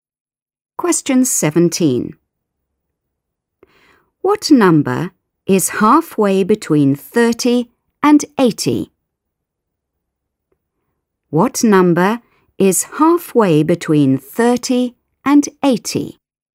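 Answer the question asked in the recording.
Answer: 55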